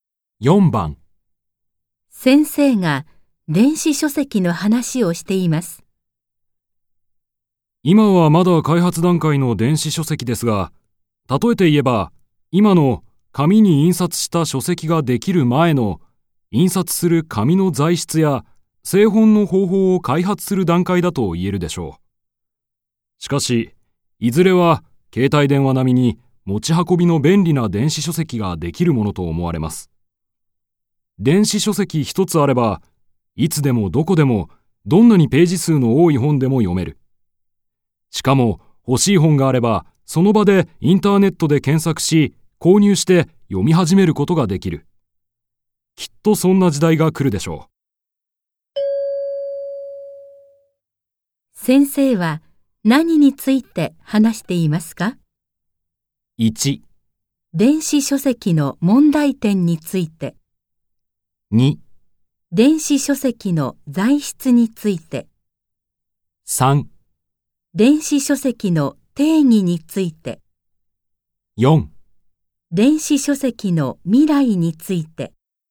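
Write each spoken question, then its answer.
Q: 先生は何について話していますか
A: 4: 電子書籍の未来について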